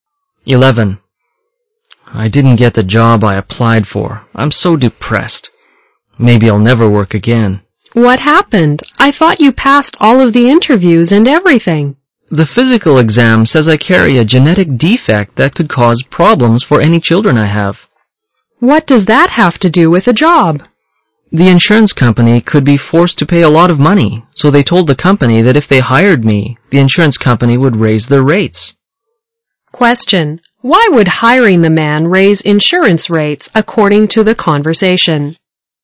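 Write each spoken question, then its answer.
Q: Why would hiring the man raise insurance rates according to the conversation?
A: He carries a genetic defect that could cause problems for any children he has, so the insurance company could be forced to pay a lot of money.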